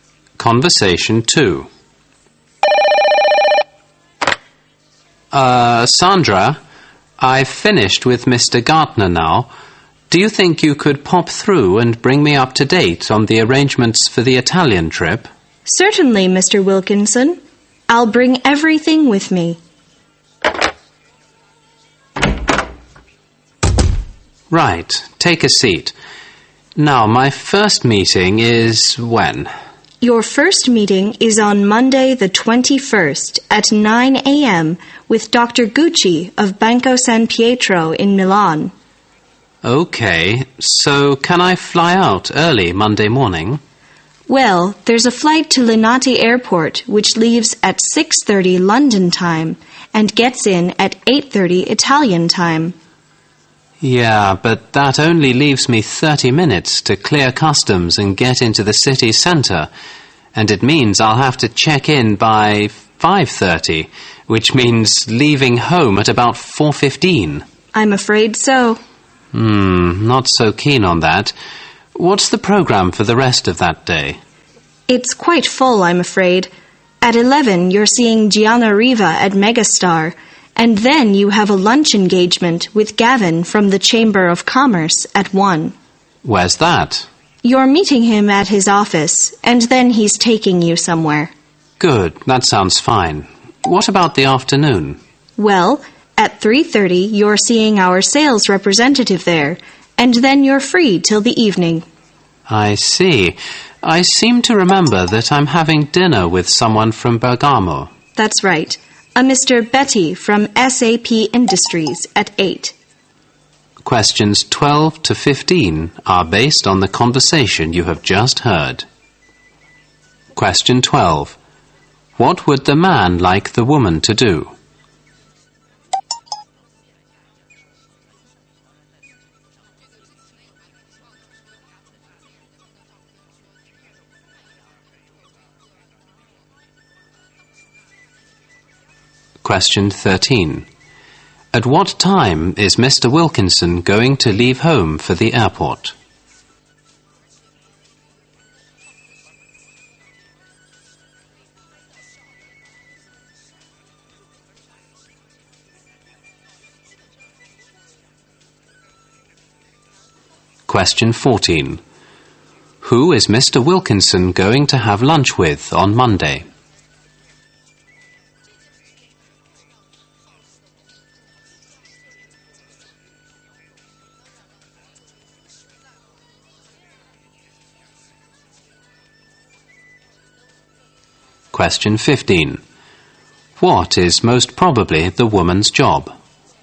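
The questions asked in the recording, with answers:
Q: What would the man like the woman to do?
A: Update him on the arrangements for the Italian trip

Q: At what time is Mr. Wilkinson going to leave home for the airport?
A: At about 4:15

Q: Who is Mr. Wilkinson going to have lunch with on Monday?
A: Gavin from the Chamber of Commerce

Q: What is most probably the woman's job?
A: Secretary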